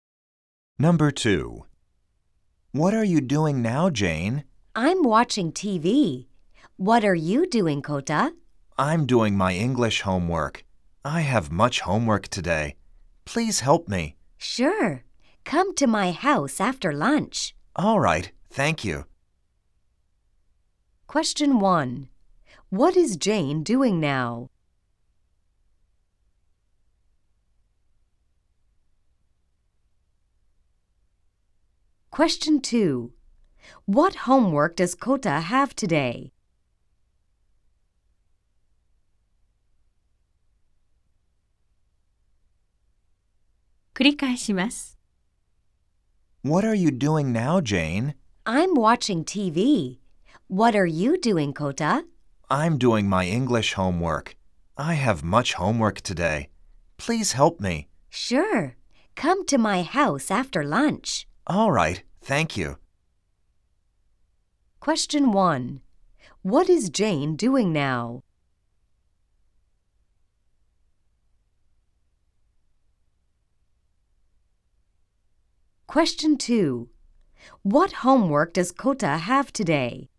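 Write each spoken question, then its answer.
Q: What is Jane doing now?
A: テレビを見ている

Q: What homework does Kota have today?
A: 英語の宿題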